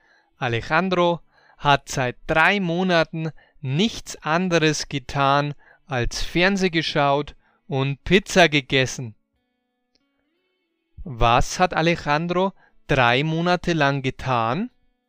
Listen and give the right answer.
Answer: Fernseh geschaut und Pizza gegessen.